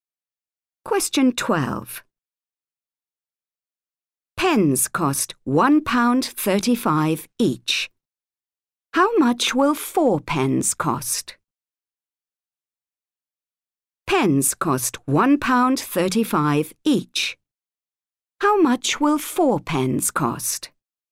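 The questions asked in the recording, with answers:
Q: Pens cost £1.35 each. How much will 4 pens cost?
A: £5.40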